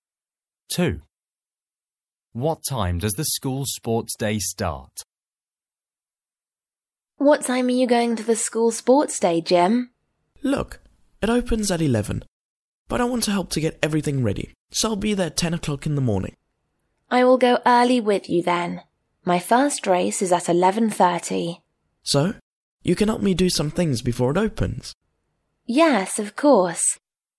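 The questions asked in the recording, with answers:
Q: What time does the school sports day start?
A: At 11 o'clock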